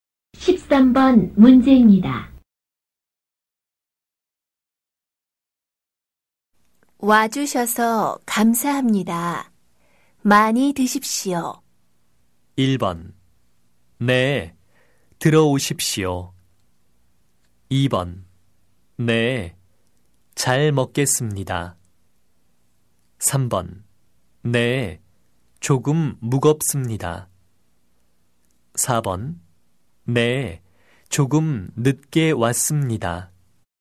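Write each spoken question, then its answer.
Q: 와주셔서 감사합니다. 많이 드십시오.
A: 2: 네, 잘 먹겠습니다.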